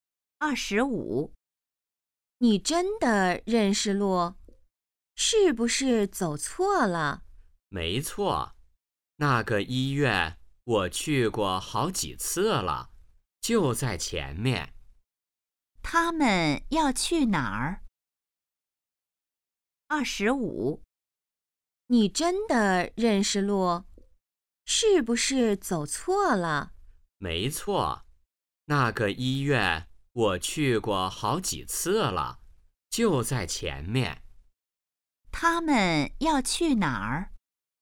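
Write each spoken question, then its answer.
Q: 他们要去哪儿?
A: 医院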